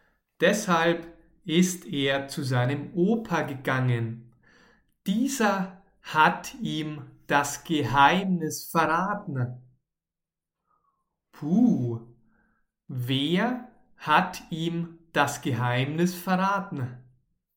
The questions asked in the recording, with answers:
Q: Puh, wer hat ihm das Geheimnis verraten?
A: Sein Opa, sein Opa hat ihm das Geheimnis verraten.